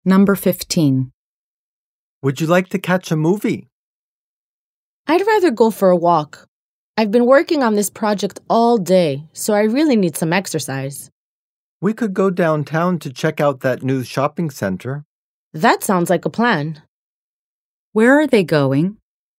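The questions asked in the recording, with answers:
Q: Where are they going?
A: To the new shopping center downtown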